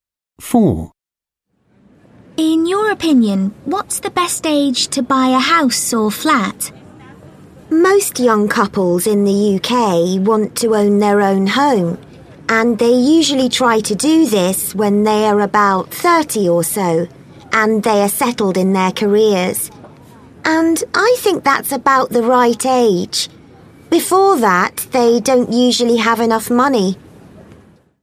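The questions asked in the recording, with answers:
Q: In your opinion, what's the best age to buy a house or flat?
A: About 30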